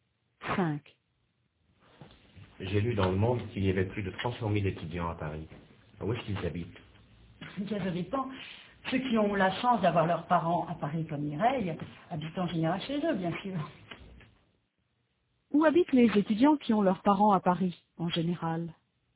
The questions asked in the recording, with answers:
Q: Où habitent les étudiants qui ont leurs parents à Paris, en général ?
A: Chez eux.